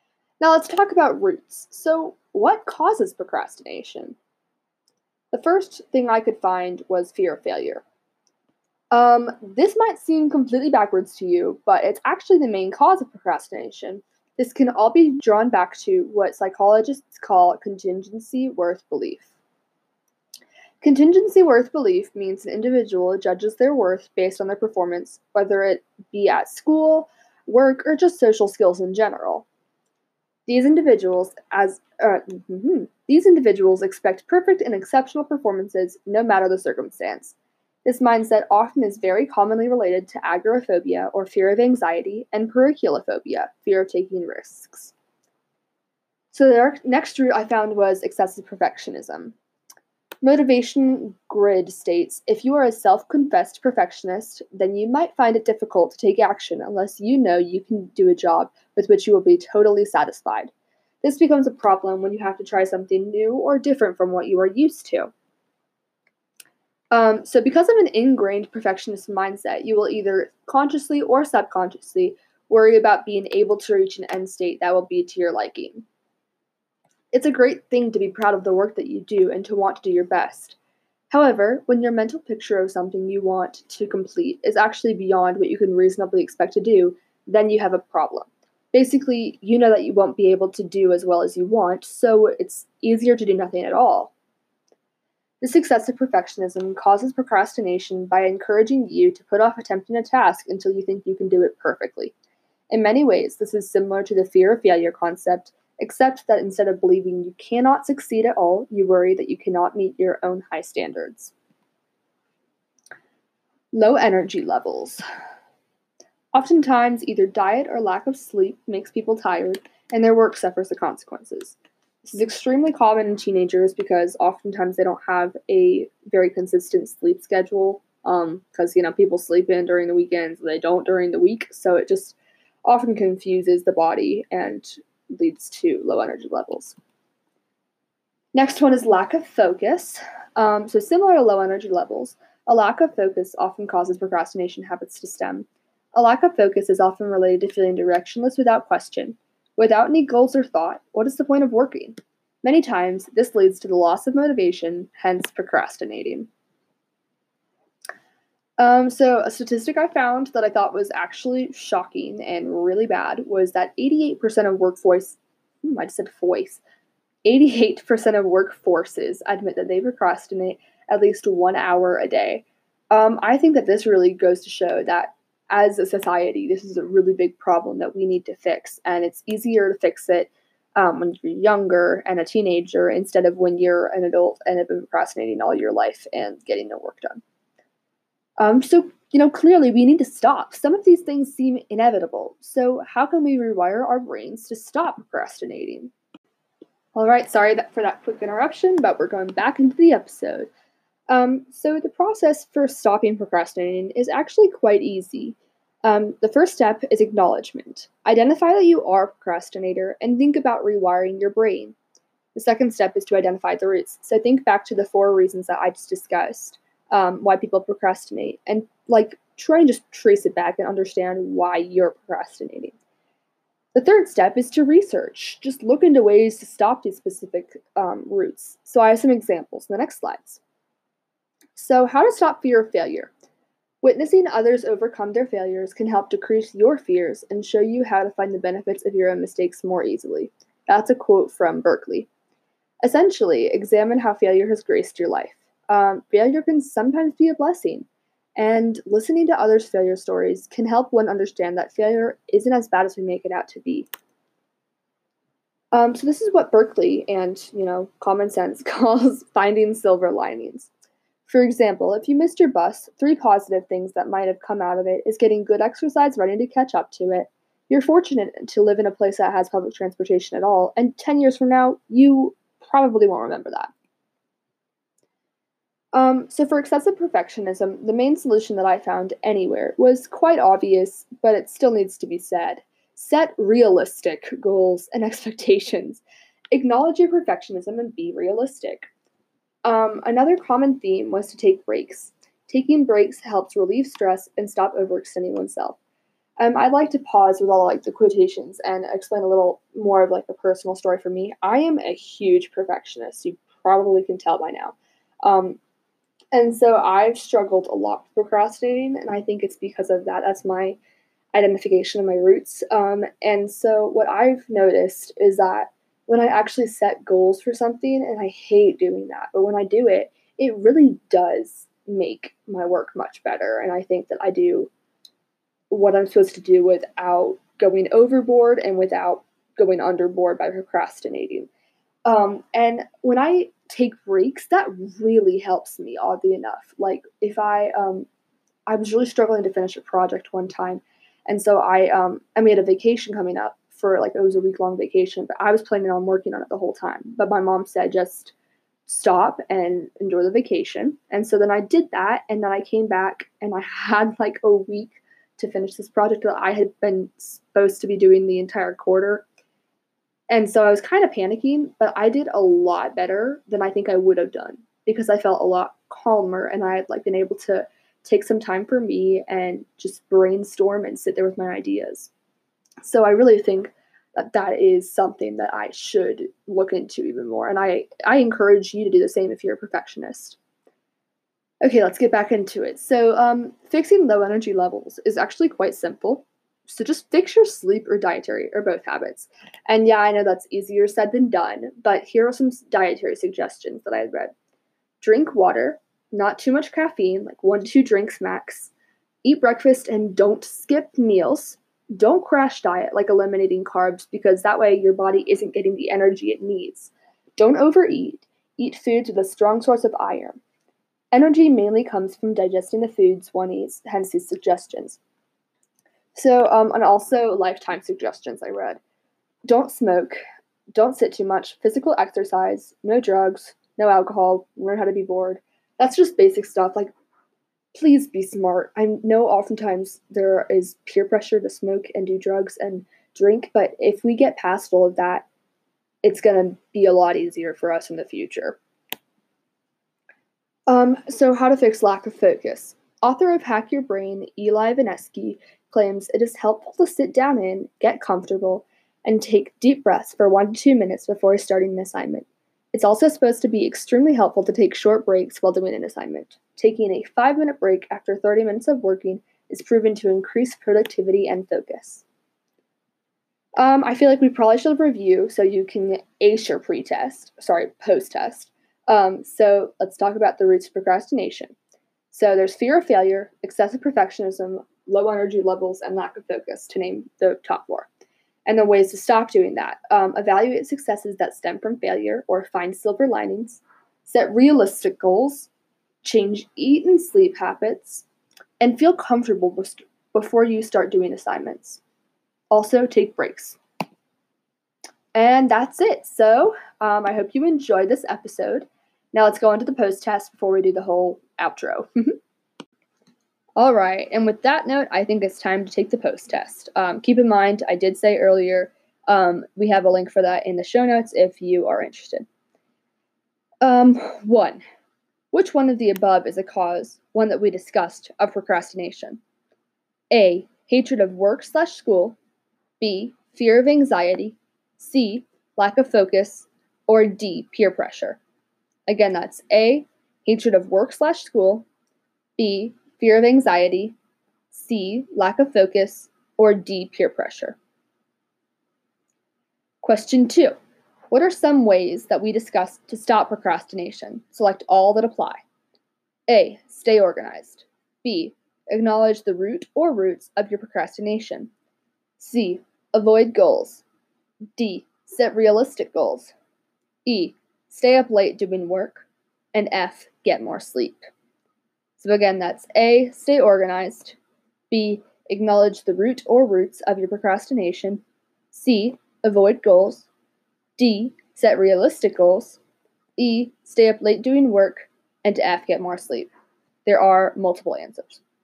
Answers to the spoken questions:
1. The correct answer was C, lack of focus.
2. it should be B, acknowledge the root or roots of your procrastination, D, set realistic goals, and F, get more sleep.